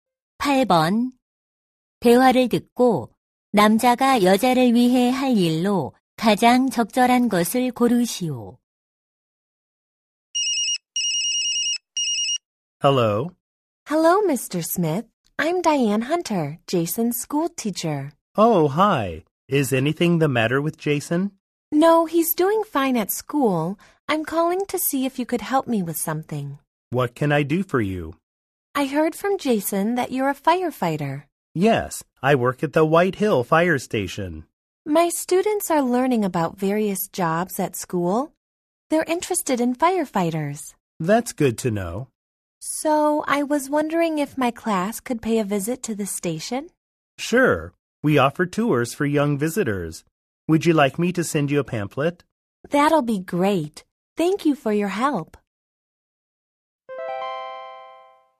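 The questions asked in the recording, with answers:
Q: 대화를 듣고 남자가 여자를 위해 할 일로 가장 적절한 것을 고르시오.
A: 소방서 견학 안내 팸플릿 보내기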